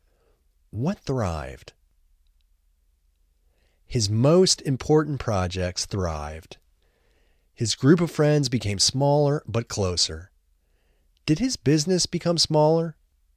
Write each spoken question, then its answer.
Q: Did his business become smaller?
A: No, his business didn't become smaller.